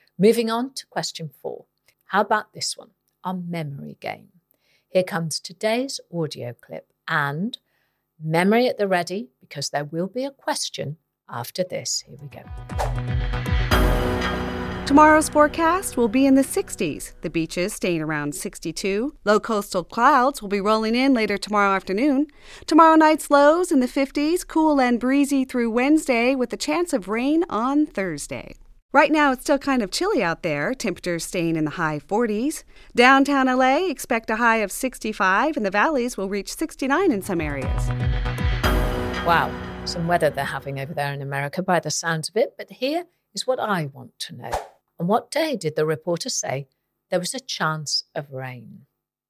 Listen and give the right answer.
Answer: And the answer was Thursday.